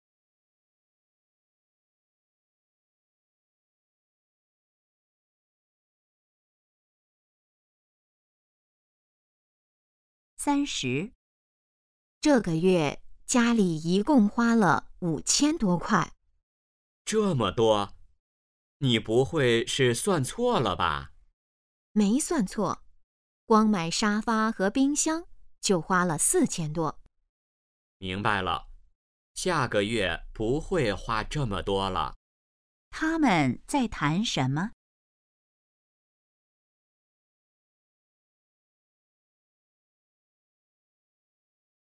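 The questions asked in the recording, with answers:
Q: 他们在谈什么?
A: 这个月家里花的钱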